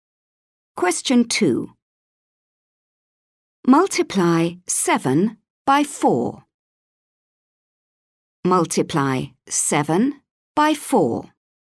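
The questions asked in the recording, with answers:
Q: Multiply 7 by 4.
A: 28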